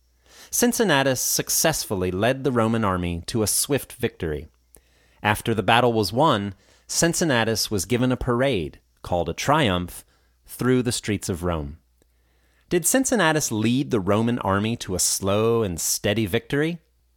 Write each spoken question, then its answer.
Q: Did Cincinnatus lead the Roman army to a slow and steady victory?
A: No, he led the Roman army to a swift victory.